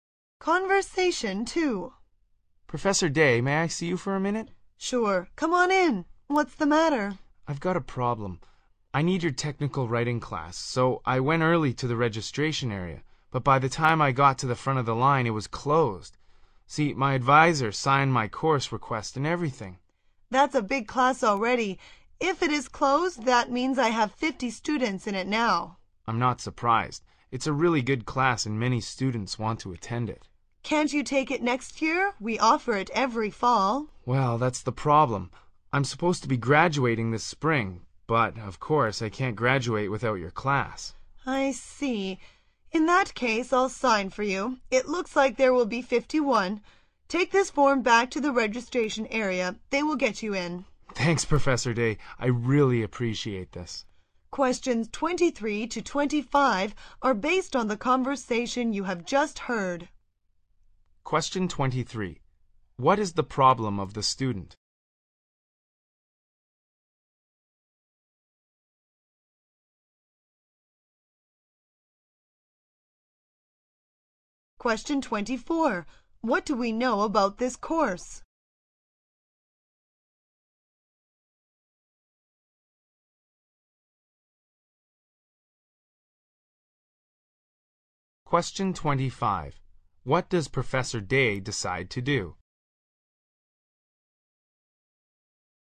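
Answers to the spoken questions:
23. The technical writing class was closed before registration
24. It is a popular class, offered every fall
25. Sign the form to let the student into the class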